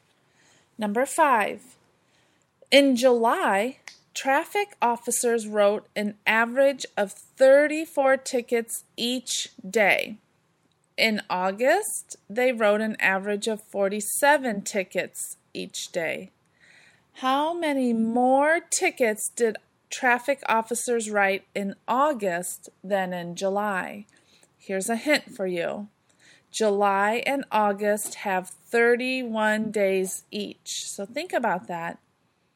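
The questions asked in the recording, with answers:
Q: How many more tickets did traffic officers write in August than in July?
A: 403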